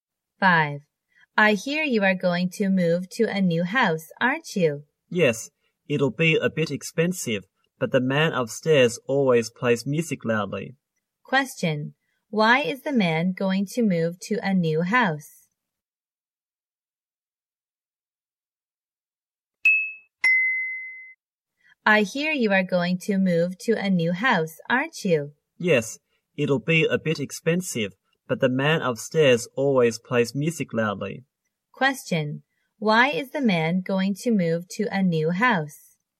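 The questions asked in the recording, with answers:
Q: Why is the man going to move to a new house?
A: Because the man upstairs always plays music loudly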